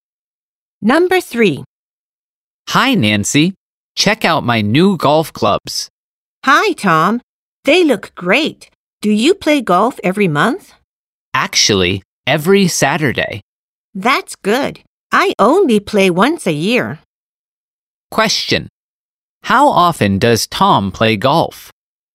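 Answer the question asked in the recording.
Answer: Every Saturday.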